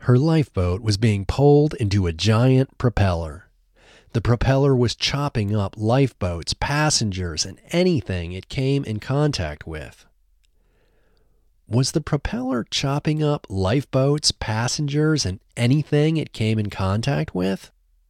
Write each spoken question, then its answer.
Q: Was the propeller chopping up lifeboats, passengers, and anything it came in contact with?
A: Yes, the propeller was chopping up lifeboats, passengers, and anything it came in contact with.